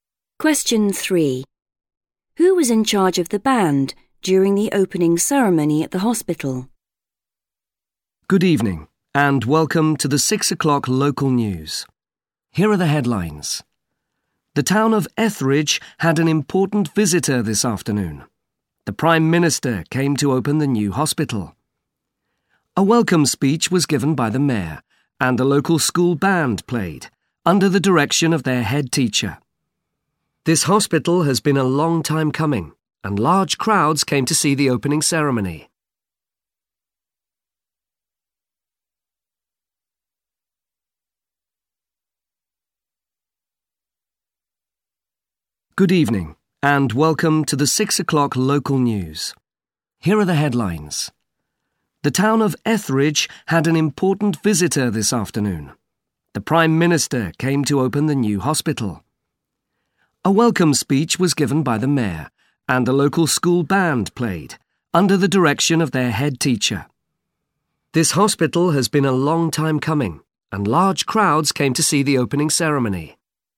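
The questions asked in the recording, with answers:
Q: Who was in charge of the band during the opening ceremony at the hospital?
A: the head teacher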